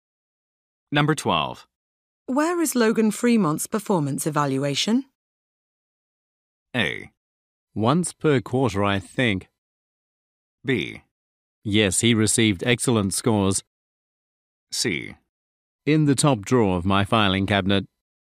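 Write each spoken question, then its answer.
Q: Where is Logan Fremont's performance evaluation?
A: C: In the top drawer of my filing cabinet.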